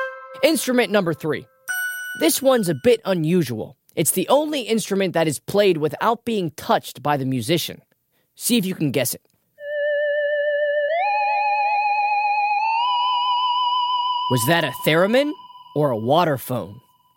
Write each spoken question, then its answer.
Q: Was that a theremin or a waterphone?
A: Those are the haunting tones of a theremin.